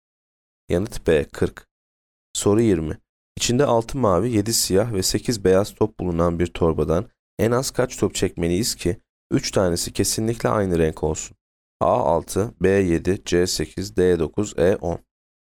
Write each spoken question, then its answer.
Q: İçinde 6 mavi, 7 siyah ve 8 beyaz top bulunan bir torbadan en az kaç top çekmeliyiz ki 3 tanesi kesinlikle aynı renk olsun?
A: Yanıt B 7.